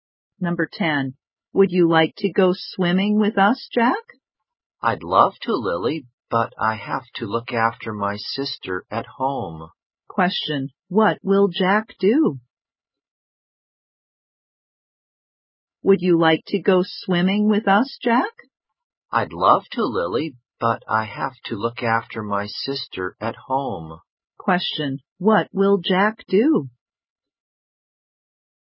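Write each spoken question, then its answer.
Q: Question, what will Jack do?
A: Look after his sister at home.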